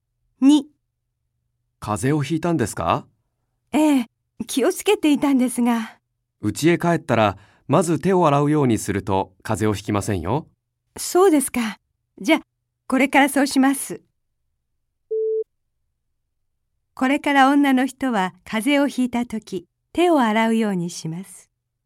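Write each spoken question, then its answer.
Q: これから女の人は風邪をひいたとき、手を洗うようにします。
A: ×(家へ帰ったら手を洗う)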